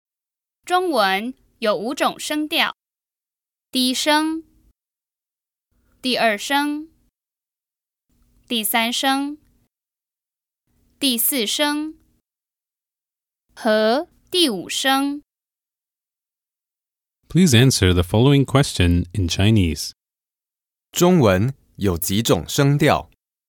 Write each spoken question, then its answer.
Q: 中文有几种声调?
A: 中文有五种声调。